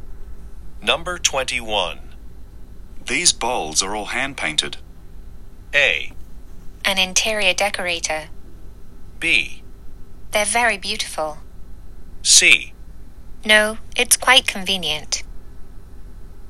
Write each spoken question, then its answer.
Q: These balls are all hand painted.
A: そして今回の正答はこちらですね。